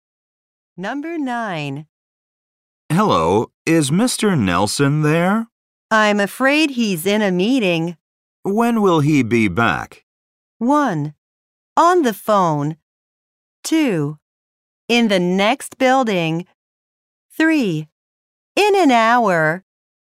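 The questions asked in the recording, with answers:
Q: When will he be back?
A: 3: In an hour.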